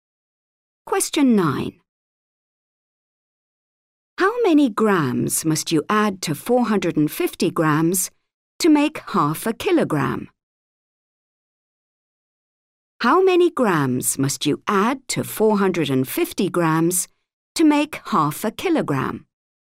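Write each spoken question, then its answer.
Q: How many grams must you add to 450 grams to make 0.5 kilogram?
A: 50 grams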